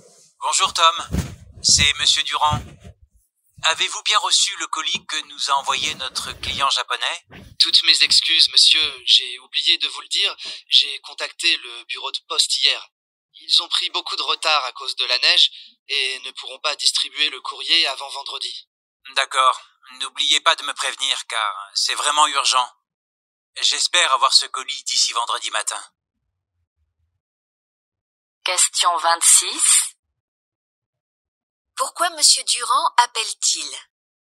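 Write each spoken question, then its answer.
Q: Pourquoi M. Durand appelle-t-il ?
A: Pour savoir si Tom a reçu le colis envoyé par le client japonais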